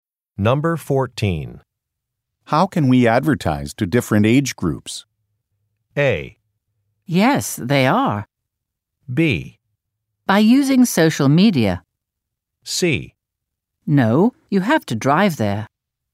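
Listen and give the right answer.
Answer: B: By using social media.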